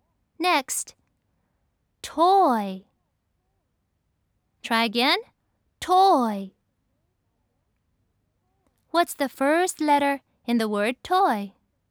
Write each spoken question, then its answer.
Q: What's the first letter in the word toy?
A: Yes, it's T.